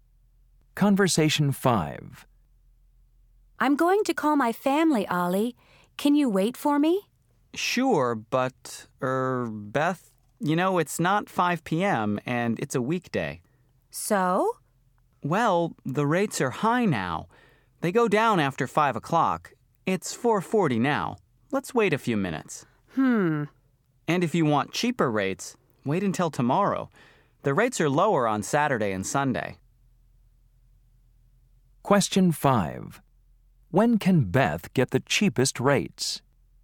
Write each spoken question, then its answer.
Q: When can Beth get the cheapest rates?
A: I'll wait and call this weekend on Saturday.